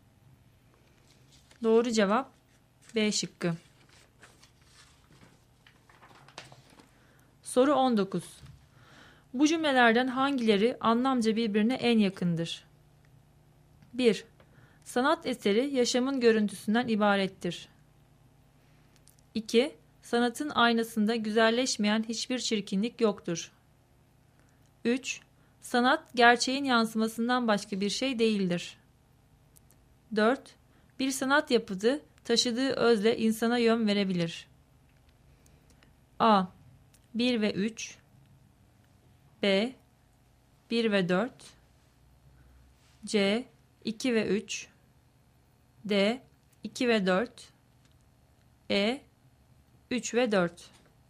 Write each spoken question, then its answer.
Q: Bu cümlelerden hangileri anlamca birbirine en yakındır?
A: Doğru cevap A şıkkı.